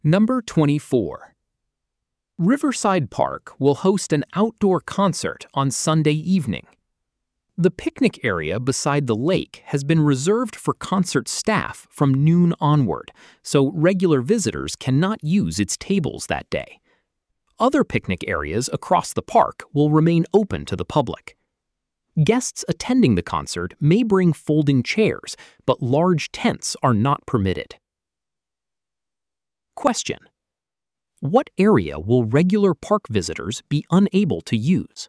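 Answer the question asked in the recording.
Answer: The picnic area beside the lake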